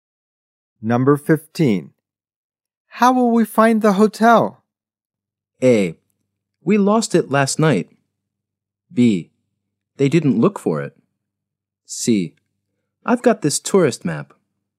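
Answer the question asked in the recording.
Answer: C: I've got this tourist map.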